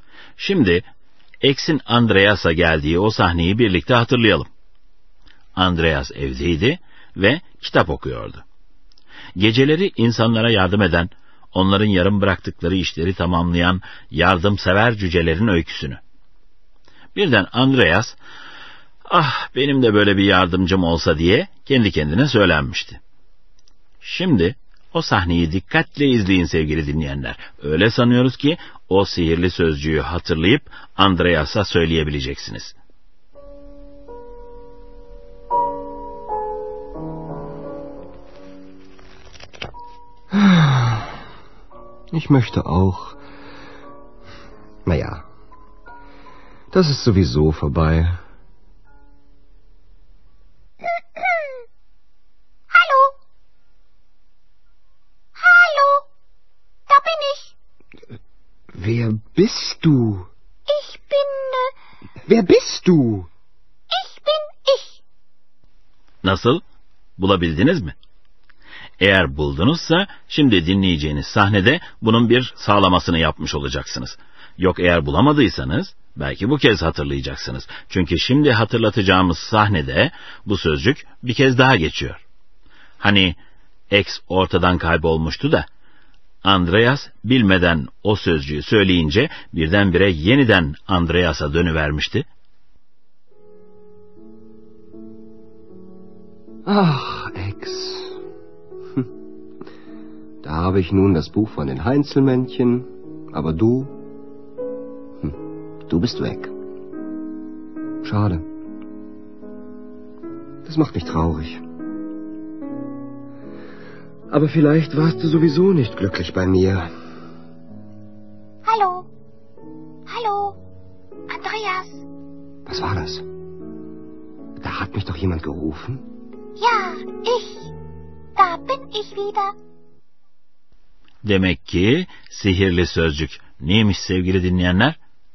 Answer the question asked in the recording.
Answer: Sowieso.